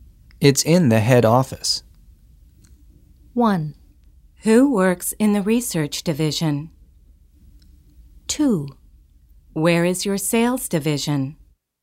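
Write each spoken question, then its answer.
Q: It's in the head office.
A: 2: Where is your sales division?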